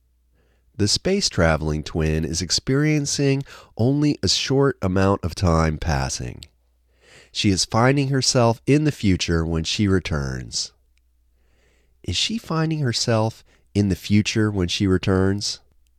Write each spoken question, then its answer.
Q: Is she finding herself in the future when she returns?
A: Yes, she is finding herself in the future.